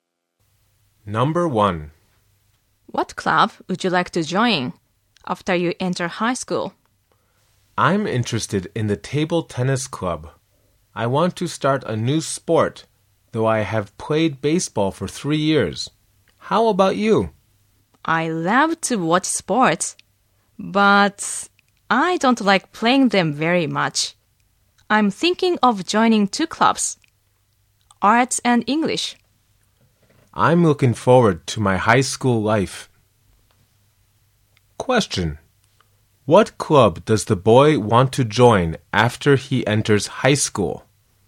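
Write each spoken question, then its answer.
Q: What club does the boy want to join after he enters high school?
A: The table tennis club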